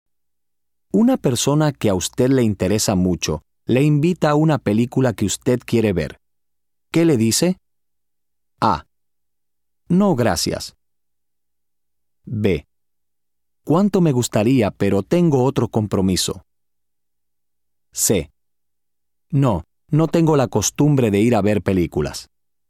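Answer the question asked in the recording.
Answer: B: ¿Cuánto me gustaría, pero tengo otro compromiso?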